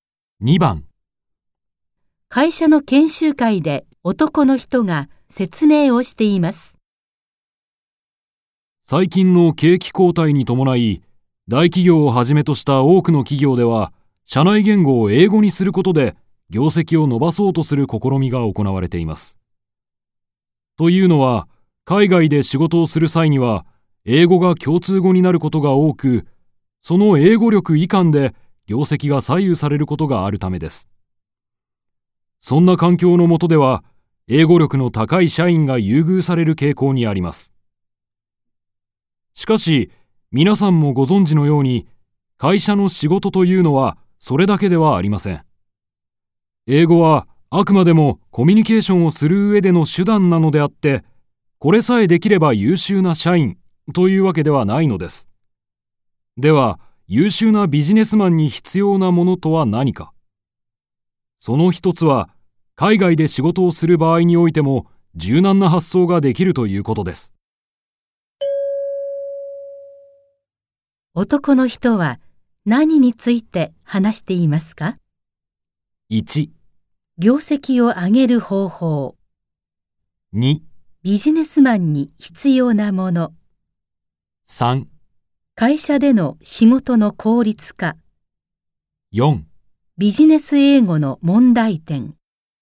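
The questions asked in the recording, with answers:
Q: 男の人は何について話していますか ?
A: 2: ビジネスマンに必要なもの。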